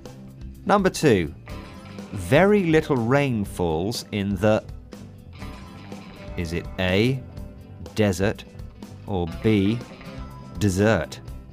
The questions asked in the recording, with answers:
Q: Number two. Very little rain falls in the... Is it A, desert, or B, dessert?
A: And the answer is A, desert.